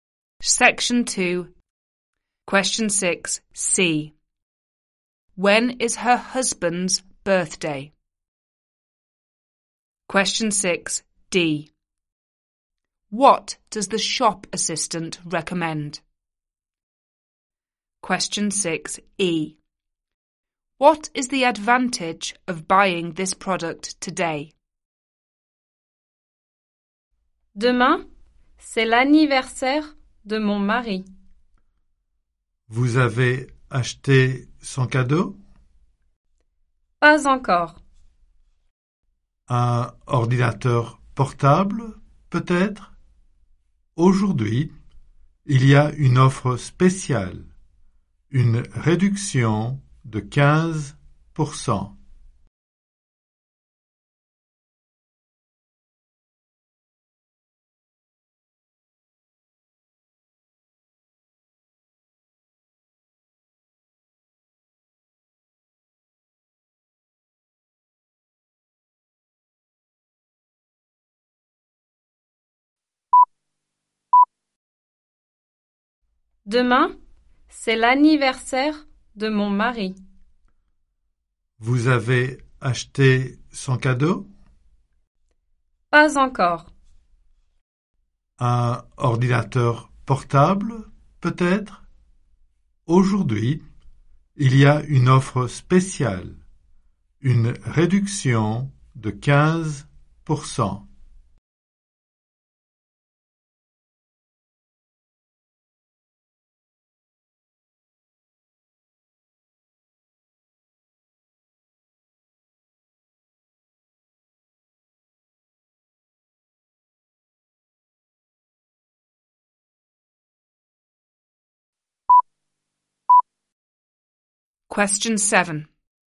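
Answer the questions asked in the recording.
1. Tomorrow
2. A laptop
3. Special offer: 15% discount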